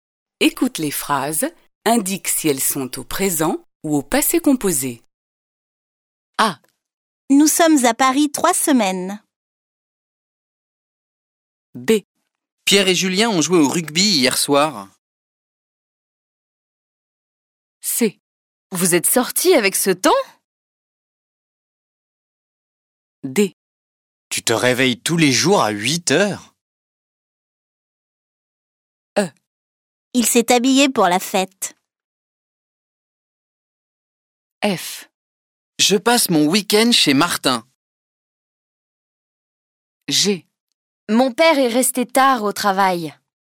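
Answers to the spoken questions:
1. présent
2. passé composé
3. passé composé
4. présent
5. passé composé
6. présent
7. passé composé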